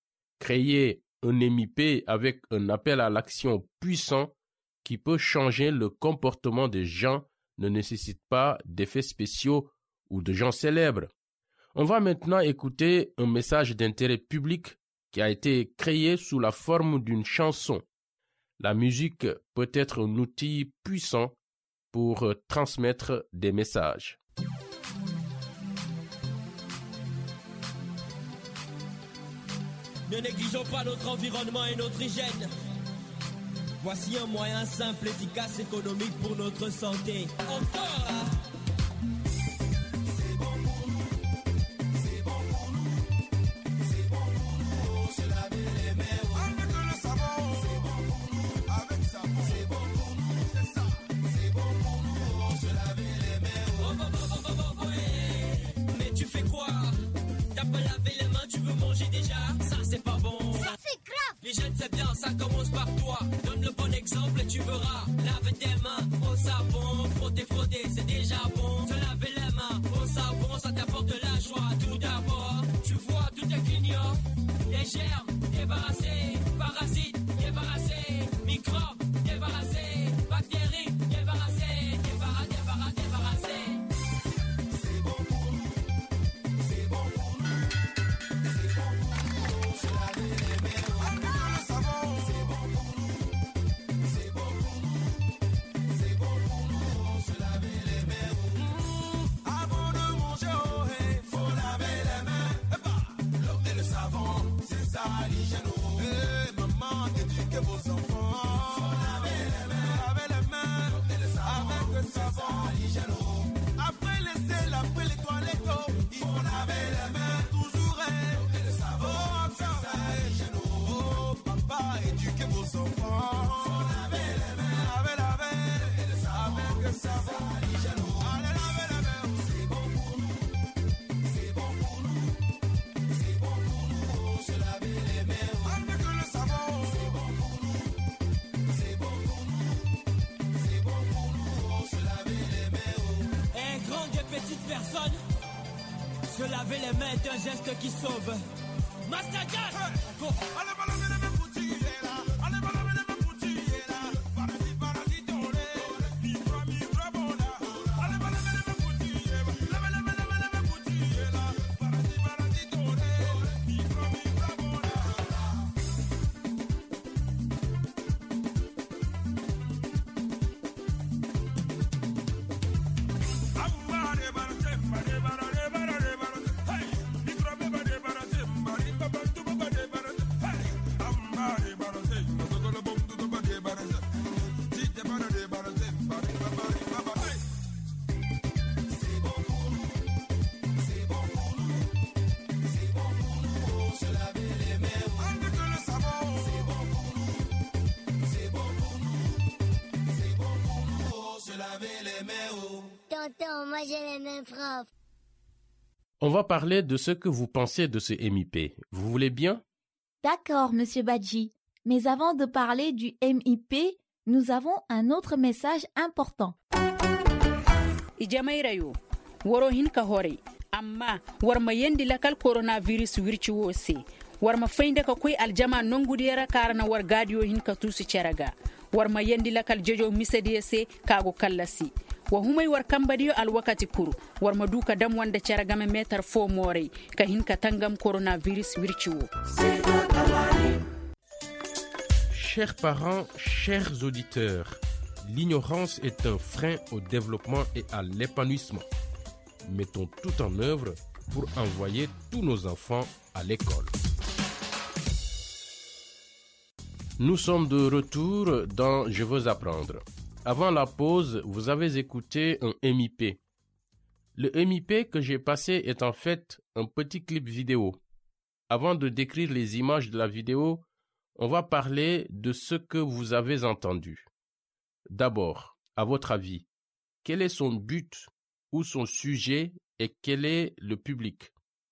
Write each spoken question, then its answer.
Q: D'abord, à votre avis, quel est son but ou son sujet et quel est le public?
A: C'est un MUP sur le lavage des mains pour améliorer la santé publique.